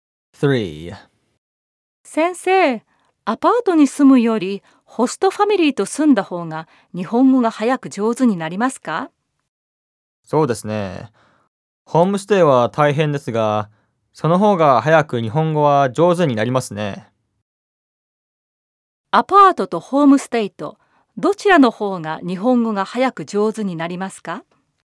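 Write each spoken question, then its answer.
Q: アパートとホームステイと、どちらの方が日本語が早く上手になりますか?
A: ホームステイの方です。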